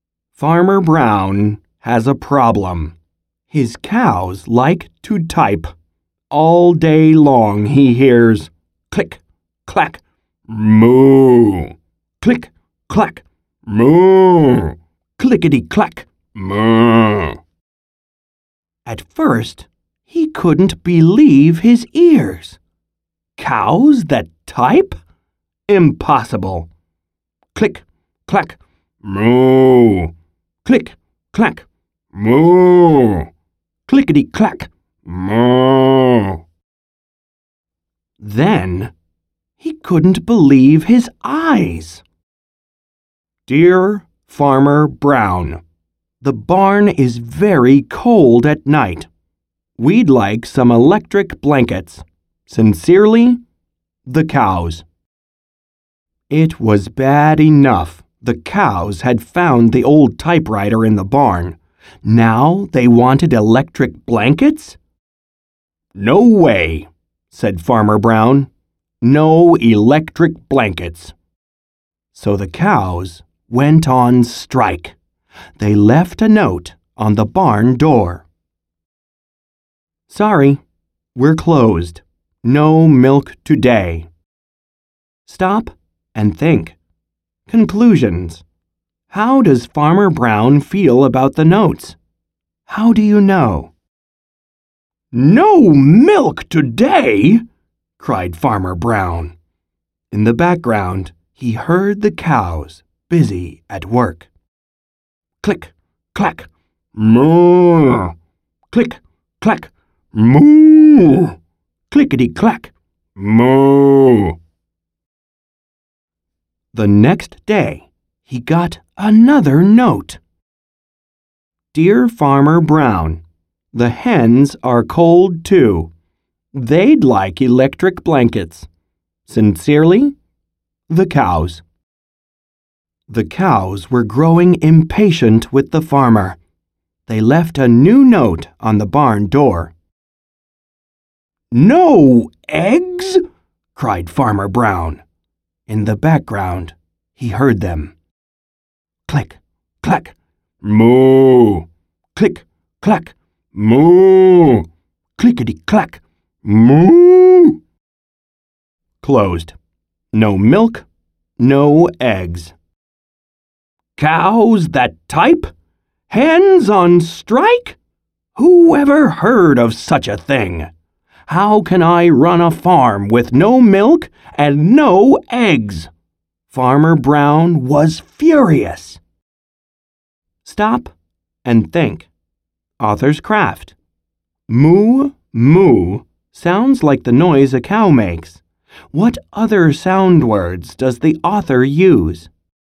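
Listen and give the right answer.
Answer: click, clack, clickety clack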